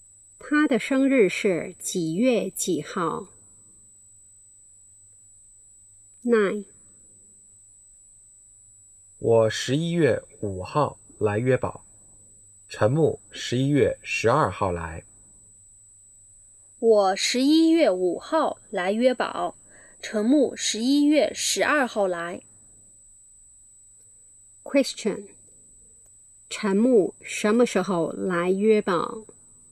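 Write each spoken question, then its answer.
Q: 陈木什么时候来约堡?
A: 11月12号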